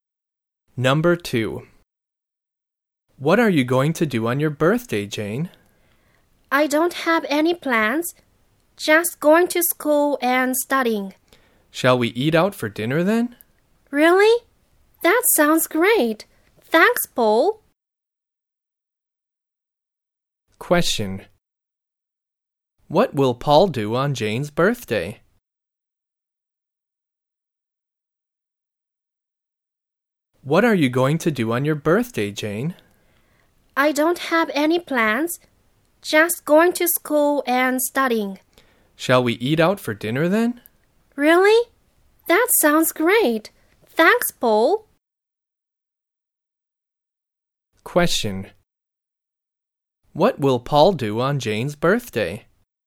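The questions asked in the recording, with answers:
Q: What will Paul do on Jane's birthday?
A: Eat out for dinner with Jane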